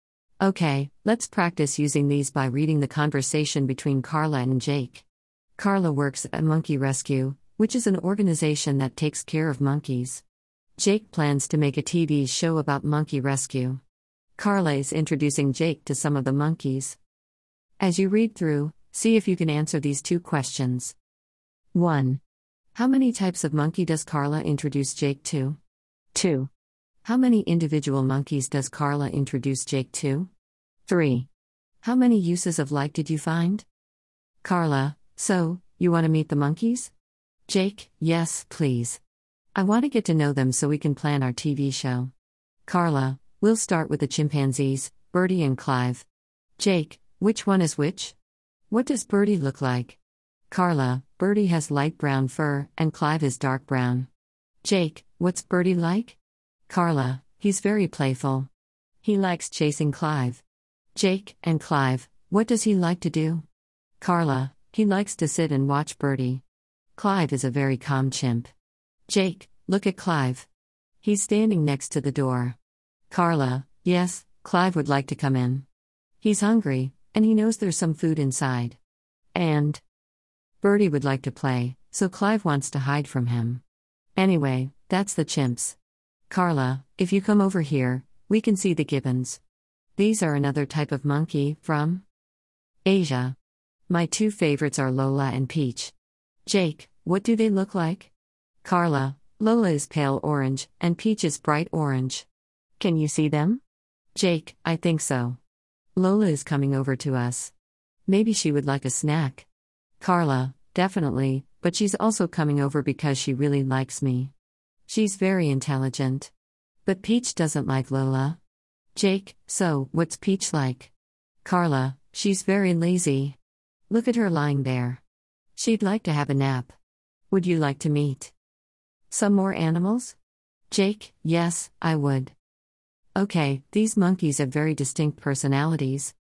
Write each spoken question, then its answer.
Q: How many types of monkey does Carla introduce Jake to?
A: There are two types of monkey chimpanzees and gibbons.

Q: How many individual monkeys does Carla introduce Jake to?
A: There are four individual monkeys Birdie, Clive, Lola, and Peach.